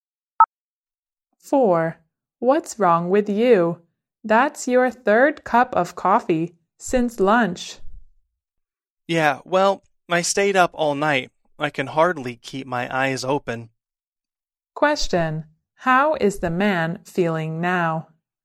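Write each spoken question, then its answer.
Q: How is the man feeling now?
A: Tired and sleepy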